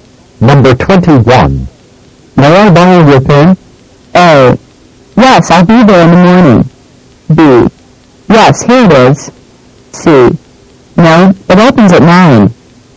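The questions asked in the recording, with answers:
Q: May I borrow your pen?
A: B: Yes, here it is.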